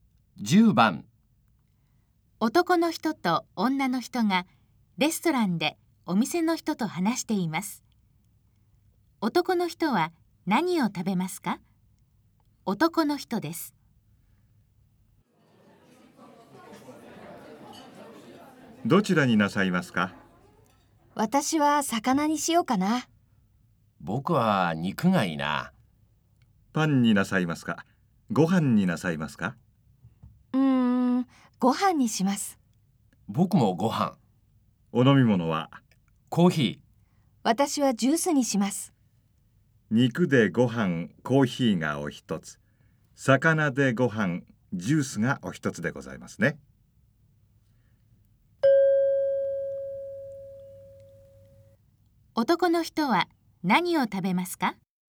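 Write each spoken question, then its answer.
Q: 男の人は何を食べますか?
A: 肉とご飯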